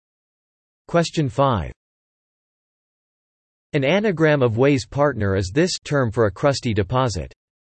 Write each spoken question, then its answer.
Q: An anagram of Way's partner is this term for a crusty deposit.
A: The answer is crud.